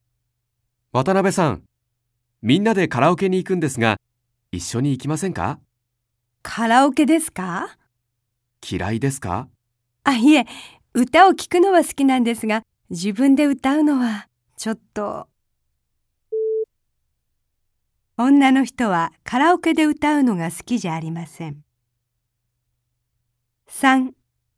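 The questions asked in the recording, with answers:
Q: 女の人はカラオケで歌うのが好きじゃありません。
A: 正しい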